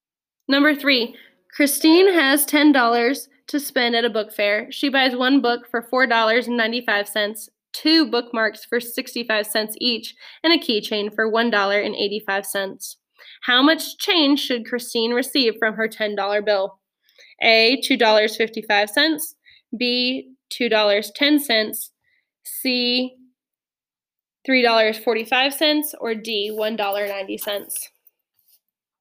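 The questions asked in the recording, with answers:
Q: How much change should Christine receive from her $10 bill?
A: D: $1.90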